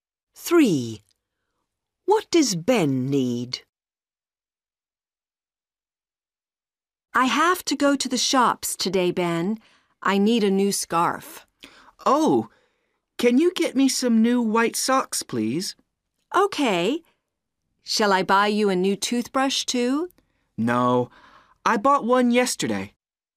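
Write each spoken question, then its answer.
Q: What does Ben need?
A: New white socks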